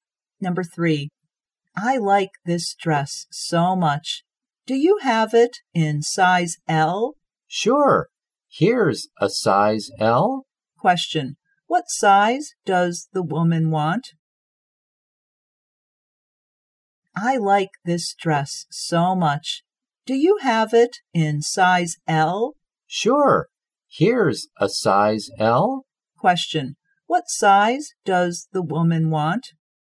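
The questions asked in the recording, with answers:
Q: what size does the woman want?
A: Size L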